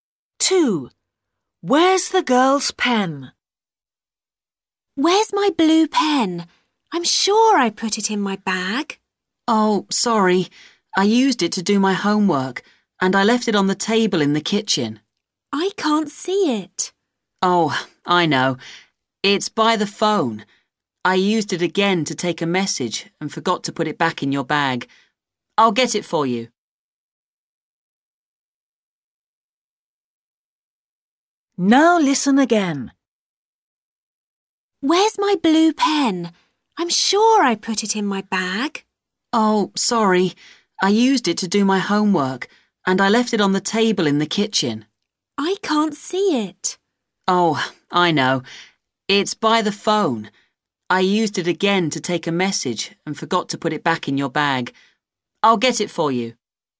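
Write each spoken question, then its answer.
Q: Where's the girl's pen?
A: By the phone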